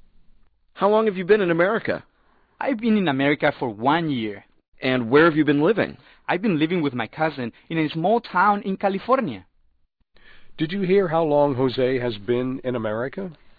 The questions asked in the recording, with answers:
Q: Did you hear how long Jose has been in America?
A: 他来美国已经一年了。